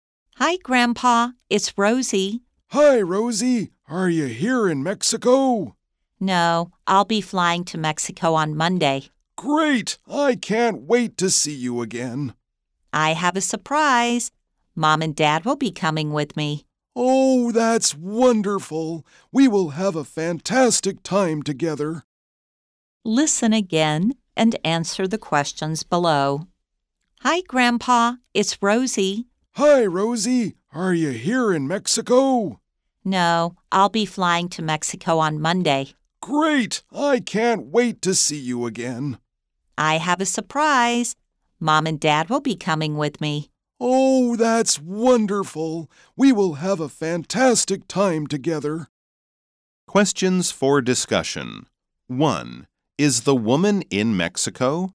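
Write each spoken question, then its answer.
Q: Is the woman in Mexico?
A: No, she'll be flying to Mexico on Monday.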